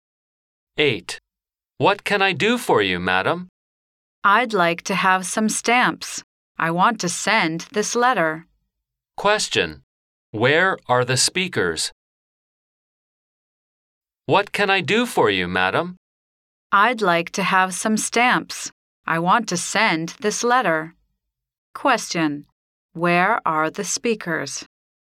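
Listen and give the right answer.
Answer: At a post office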